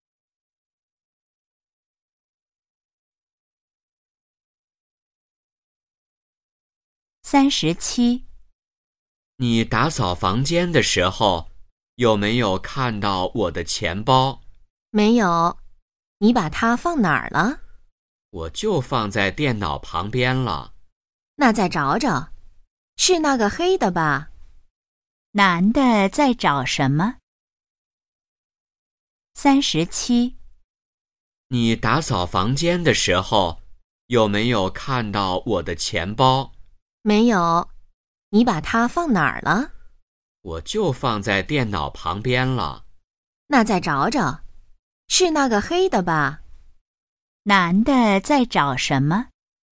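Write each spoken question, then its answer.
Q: 男的在找什么?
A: 钱包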